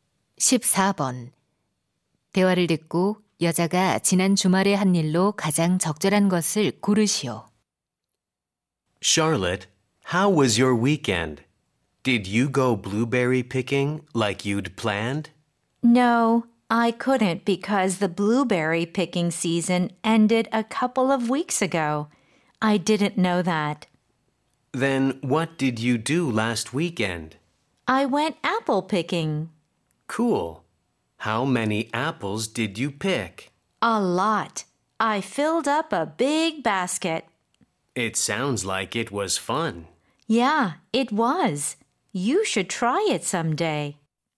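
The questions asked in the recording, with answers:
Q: 대화를 듣고 여자가 지난 주말에 한 일로 가장 적절한 것을 고르시오.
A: 사과 따기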